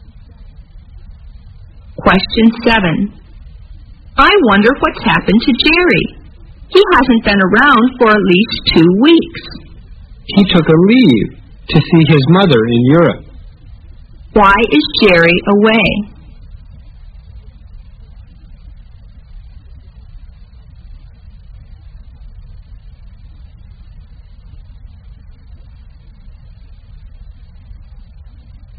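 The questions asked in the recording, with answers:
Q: Why is Jerry away?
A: He took leave to see his mother in Europe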